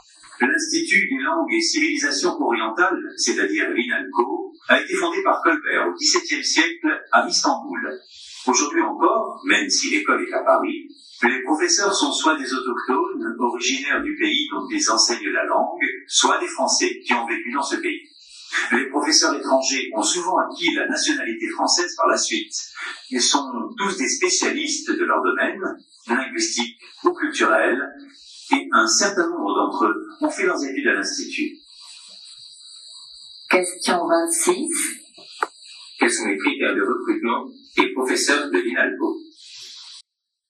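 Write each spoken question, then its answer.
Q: Quels sont les critères de recrutement des professeurs de l'INALCO ?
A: Être originaire du pays dont ils enseignent la langue, ou être Français et avoir vécu dans ce pays ; être spécialiste de son domaine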